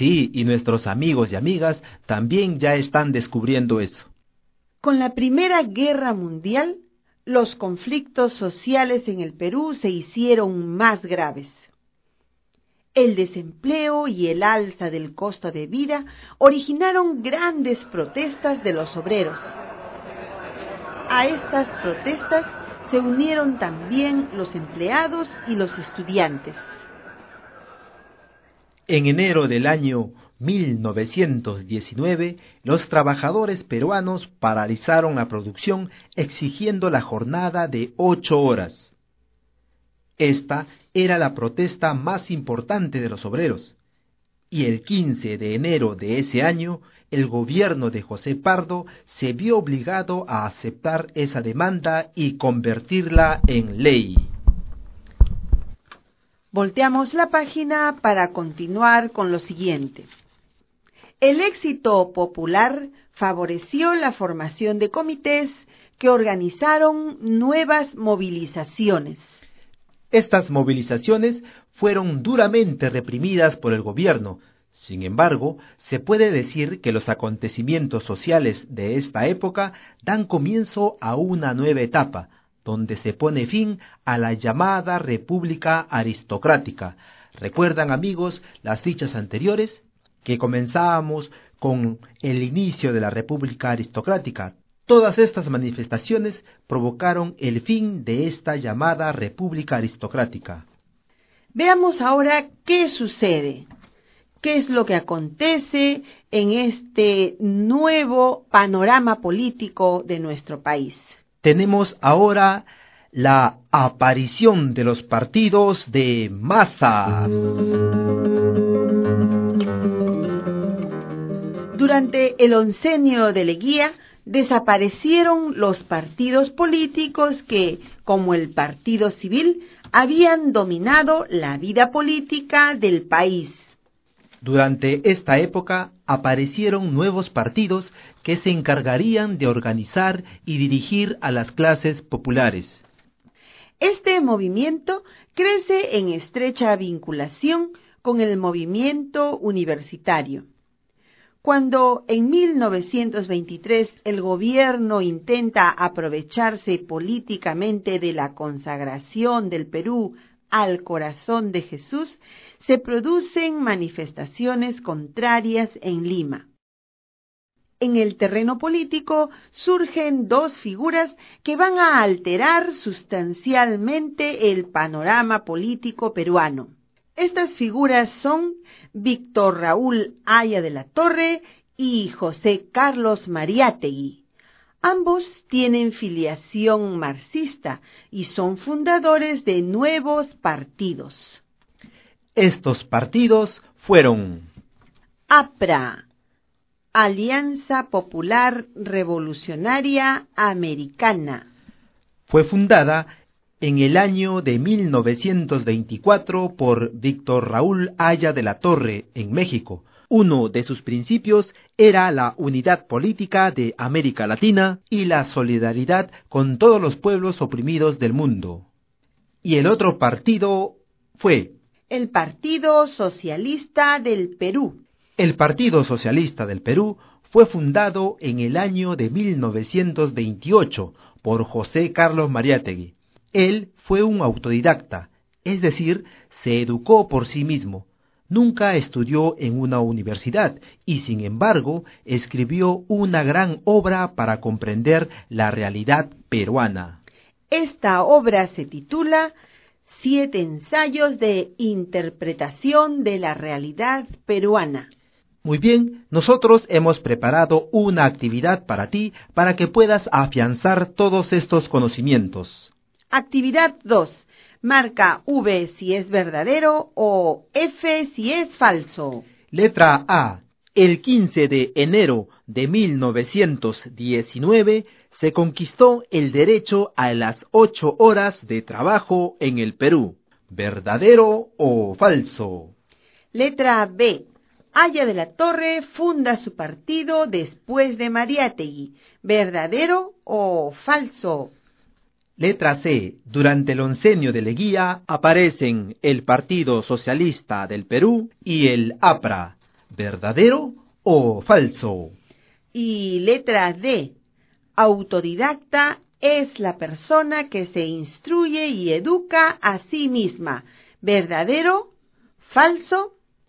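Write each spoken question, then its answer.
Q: Letra A. El 15 de enero de 1919 se conquistó el derecho a las 8 horas de trabajo en el Perú.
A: Verdadero

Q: Letra B. Haya de la Torre funda su partido después de Mariátegui.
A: Falso

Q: Letra C. Durante el oncenio de Leguía aparecen el Partido Socialista del Perú y el APRA.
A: Verdadero

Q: Y letra D. Autodidacta es la persona que se instruye y educa a sí misma. ¿Verdadero, ¿Falso?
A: Verdadero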